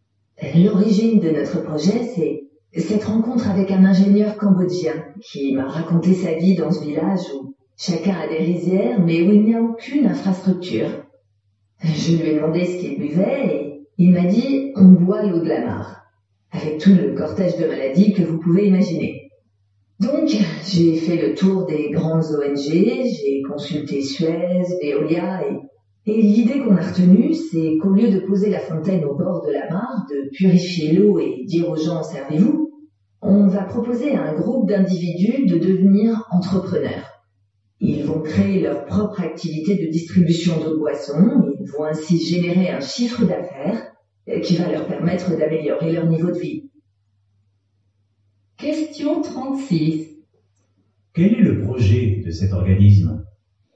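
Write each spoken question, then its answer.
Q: Quel est le projet de cet organisme ?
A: Aider des villageois cambodgiens à devenir entrepreneurs en créant leur propre activité de distribution d'eau potable.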